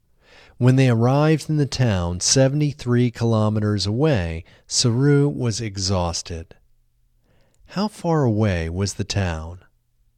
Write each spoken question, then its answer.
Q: How far away was the town?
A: The town was 73 kilometers away.